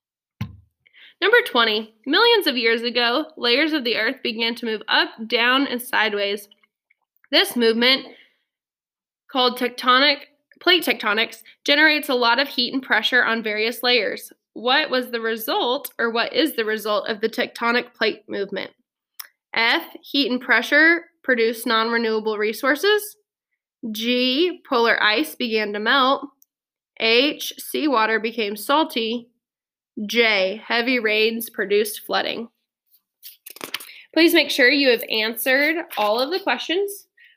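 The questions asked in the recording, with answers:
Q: What was the result, or what is the result of the tectonic plate movement?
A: F: heat and pressure produce non-renewable resources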